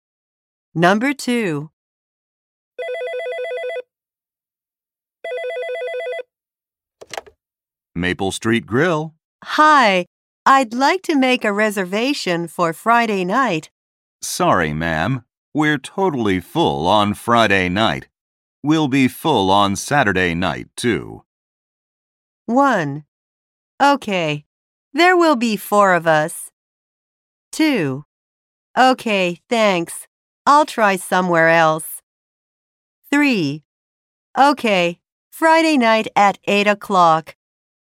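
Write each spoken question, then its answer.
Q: We'll be full on Saturday night, too.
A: 2: Okay, thanks. I'll try somewhere else.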